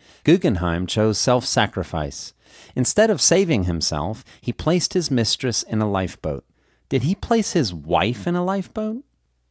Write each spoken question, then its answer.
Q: Did he place his wife in a lifeboat?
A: No, he didn't place his wife in a lifeboat.